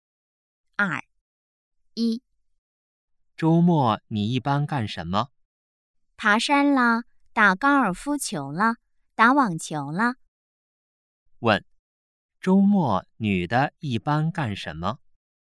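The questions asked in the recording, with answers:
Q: 问,周末女的一般干什么?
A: 爬山、打高尔夫球、打网球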